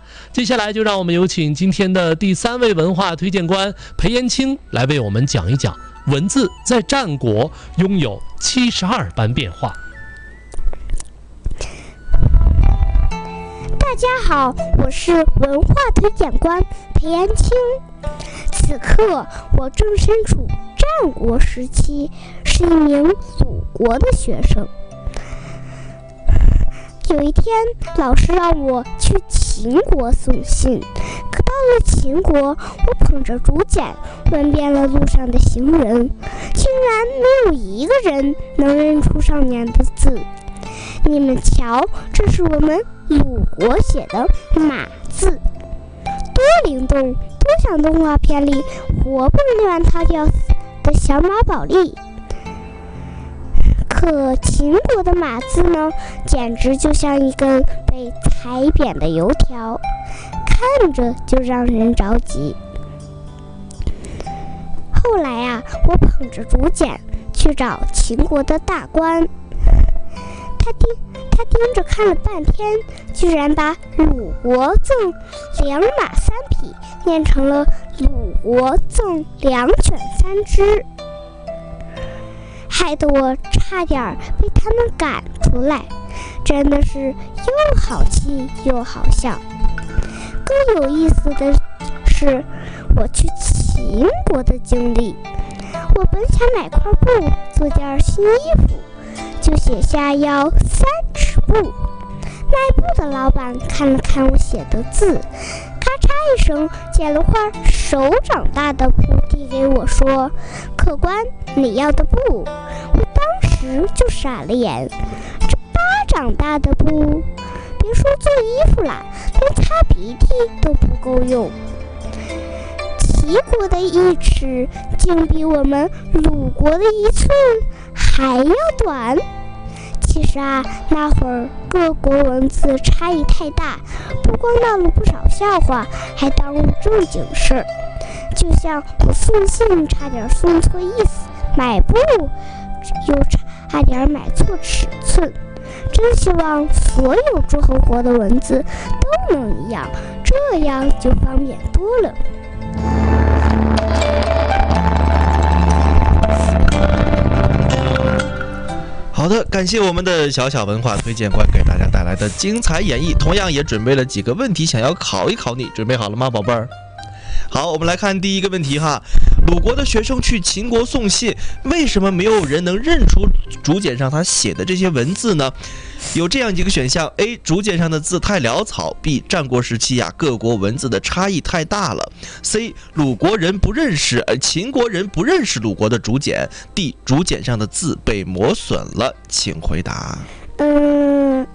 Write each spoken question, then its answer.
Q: 鲁国的学生去秦国送信,为什么没有人能认出竹简上他写的这些文字呢?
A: 第二个,战国时期各国的文字差异太大了,对不对?